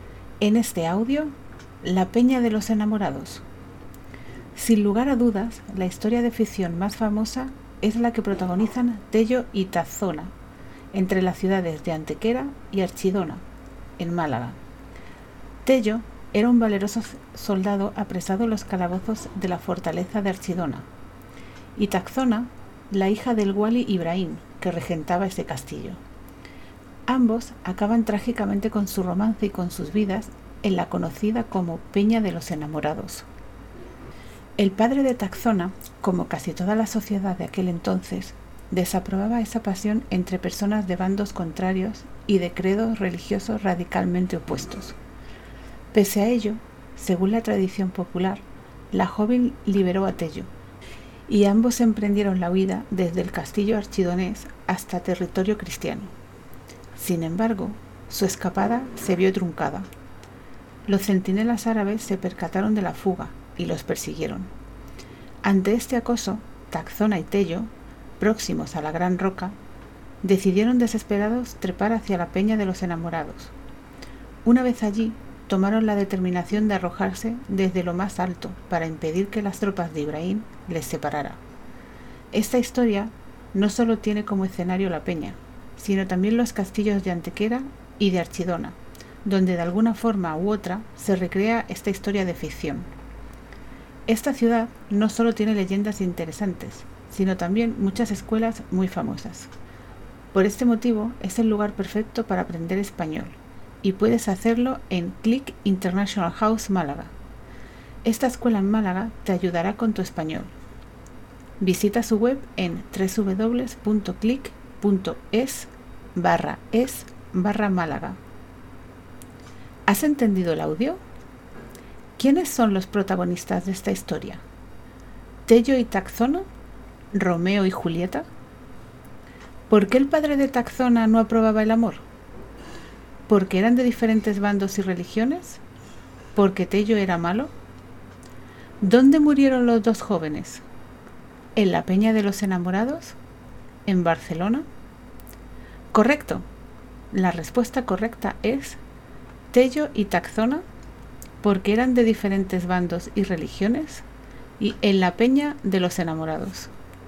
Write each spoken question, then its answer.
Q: ¿Por qué el padre de Taxona no aprobaba el amor?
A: porque eran de diferentes bandos y religiones